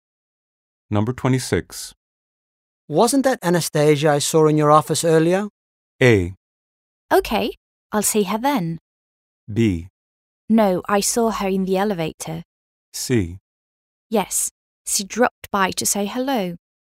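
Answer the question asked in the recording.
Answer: C: Yes, she dropped by to say hello.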